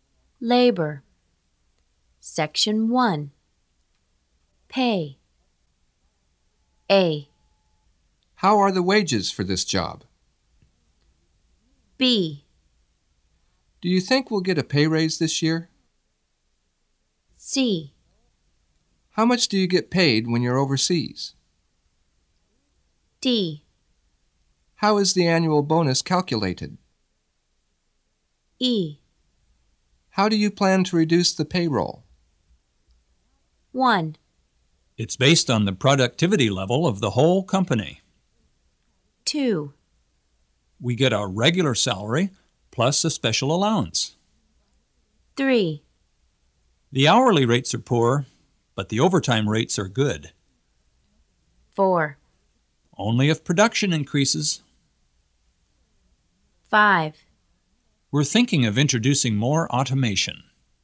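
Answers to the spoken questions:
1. D: How is the annual bonus calculated?
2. C: How much do you get paid when you're overseas?
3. A: How are the wages for this job?
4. B: Do you think we'll get a pay raise this year?
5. E: How do you plan to reduce the payroll?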